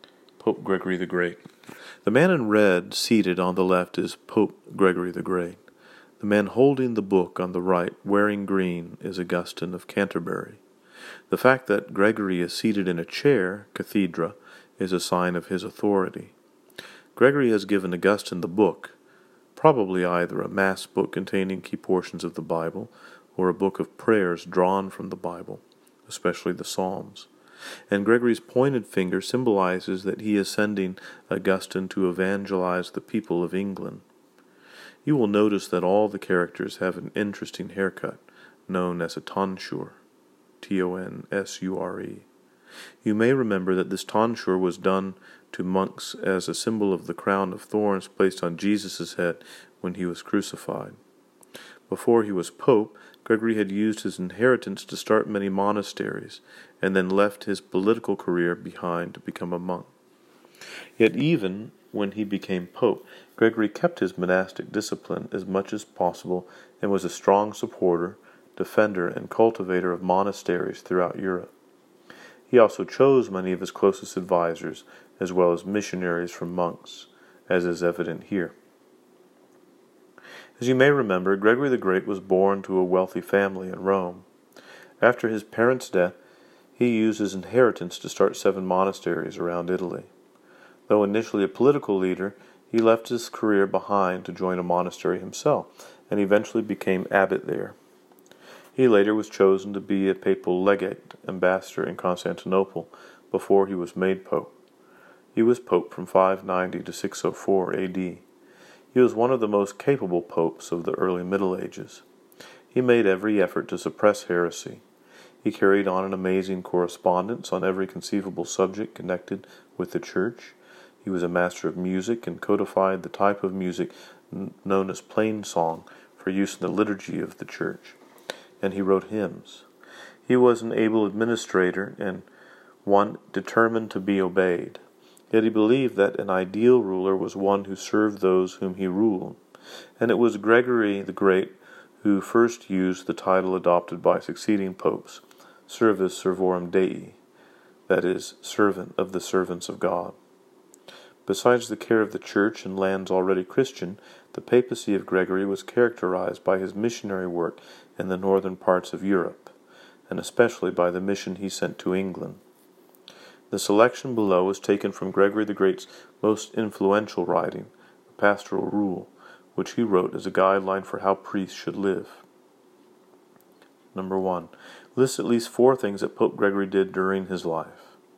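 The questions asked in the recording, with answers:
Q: List at least 4 things that Pope Gregory did during his life.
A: Started 7 monasteries, became a monk and abbot, served as papal legate in Constantinople, codified plain song and wrote hymns, suppressed heresy, sent a mission to England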